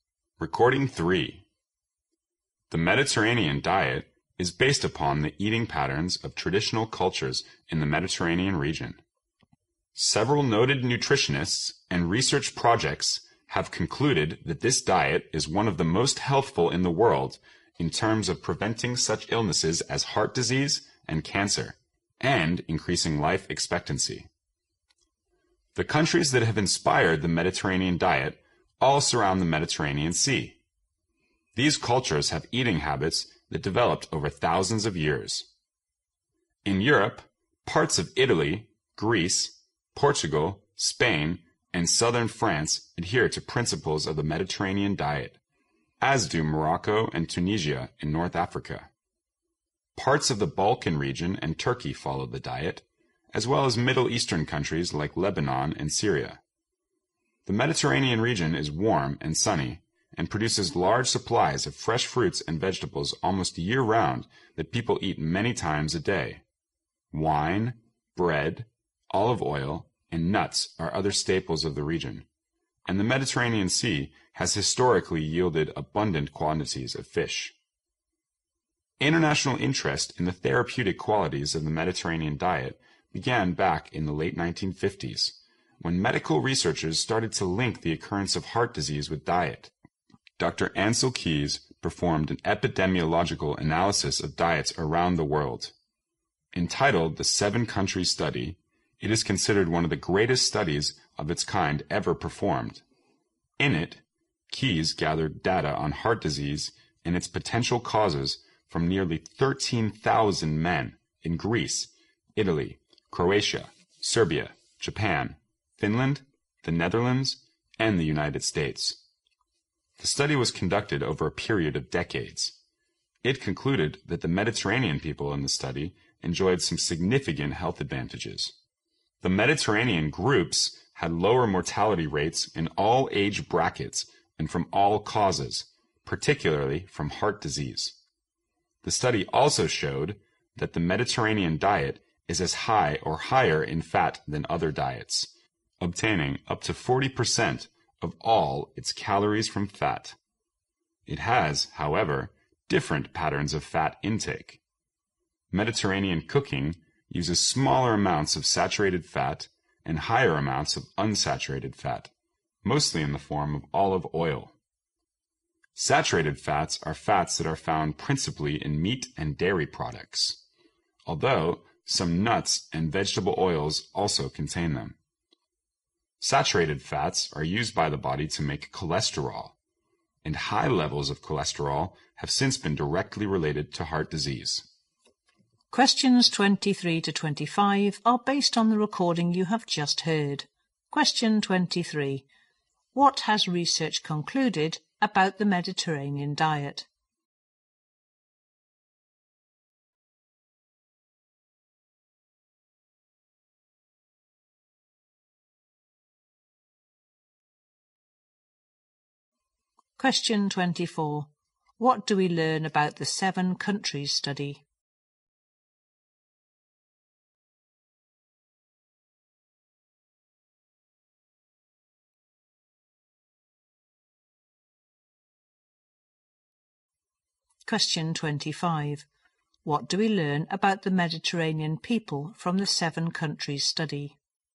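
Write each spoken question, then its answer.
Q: What has research concluded about the Mediterranean diet?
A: It is one of the most healthful diets, helping prevent heart disease and cancer

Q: What do we learn about the Mediterranean people from the seven countries study?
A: They had lower death rates, especially from heart disease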